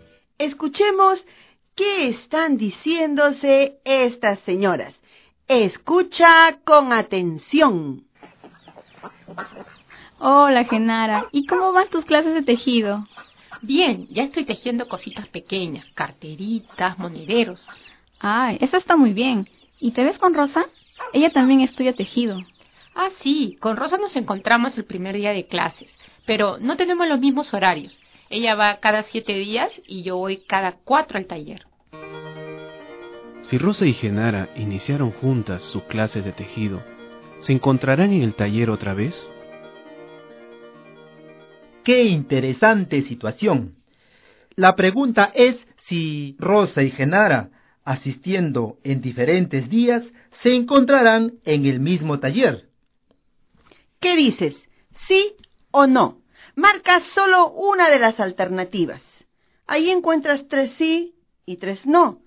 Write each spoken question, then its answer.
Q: Si Rosa y Genara iniciaron juntas su clase de tejido, ¿se encontrarán en el taller otra vez?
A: la respuesta correcta es sí